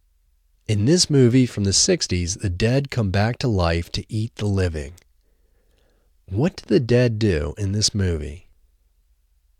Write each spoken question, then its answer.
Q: What do the dead do in this movie?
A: In this movie, the dead come back to life to eat the living.